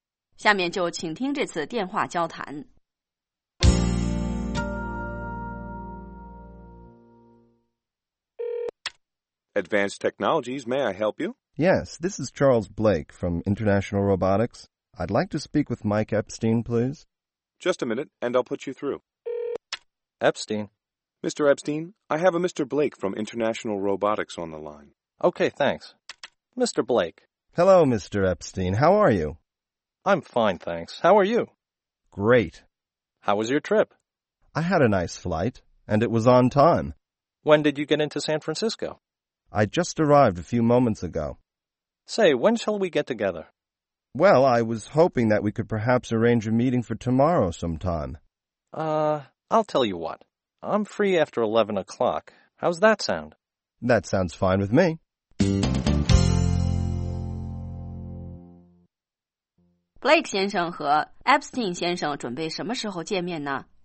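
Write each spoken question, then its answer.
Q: Blake 先生和 Epstein 先生准备什么时候见面呢?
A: 明天11点以后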